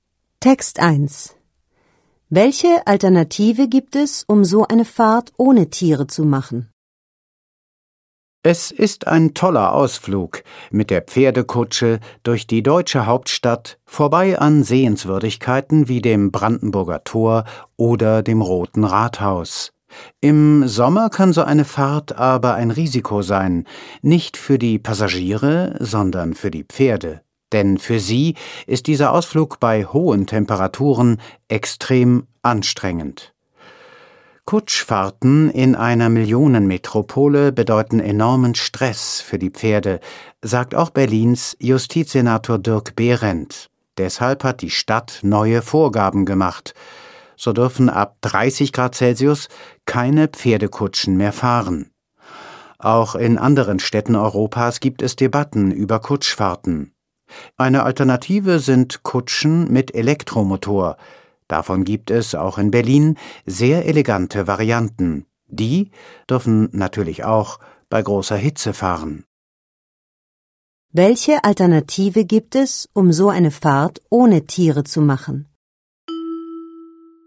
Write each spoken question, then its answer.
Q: Welche Alternative gibt es, um so eine Fahrt ohne Tiere zu machen?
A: Eine Alternative für die Pferdekutschen sind Kutschen mit Elektromotor.